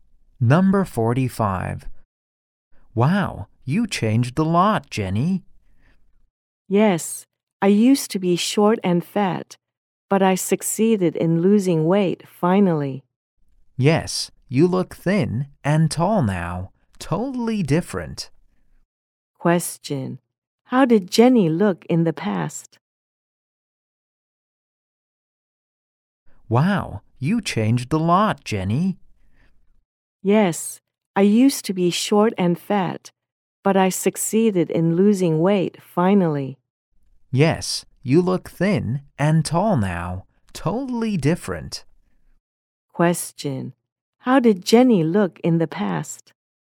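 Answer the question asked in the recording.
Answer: Short and fat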